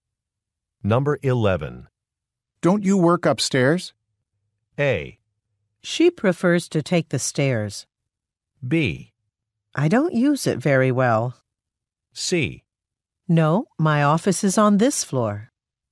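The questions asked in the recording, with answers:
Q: Don't you work upstairs?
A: C: No, my office is on this floor.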